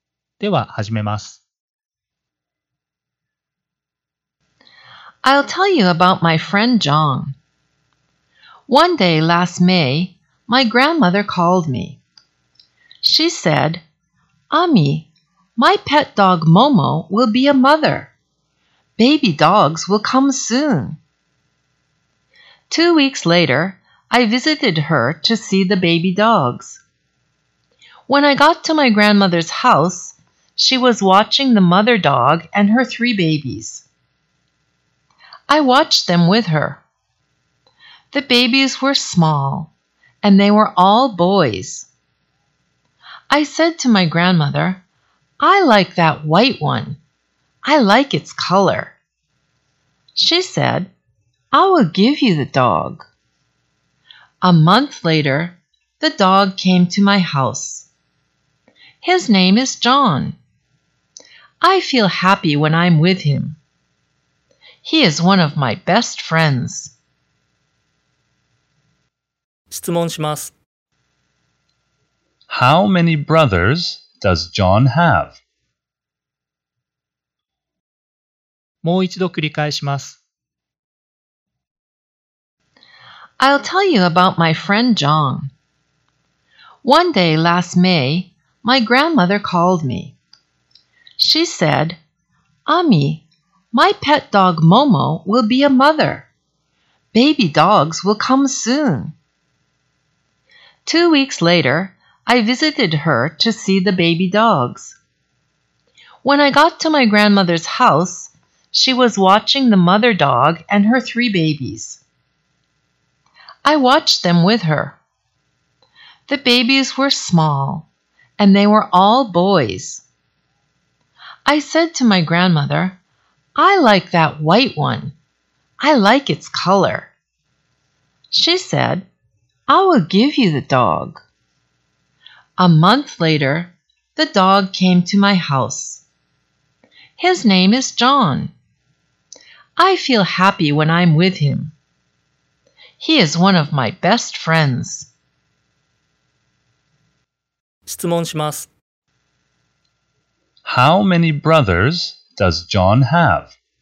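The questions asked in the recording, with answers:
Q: How many brothers does John have?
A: He has two brothers.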